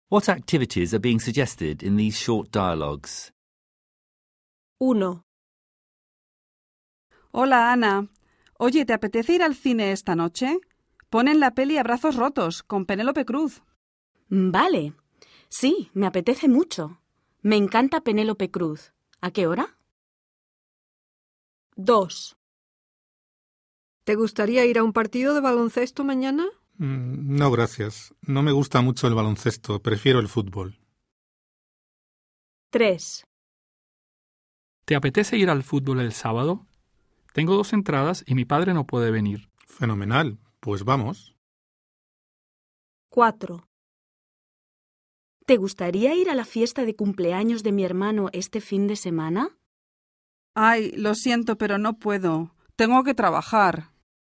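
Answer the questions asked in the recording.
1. Going to the cinema tonight (Abrazos Rotos)
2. Going to a basketball game tomorrow
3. Going to the football on Saturday
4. Going to the brother's birthday party this weekend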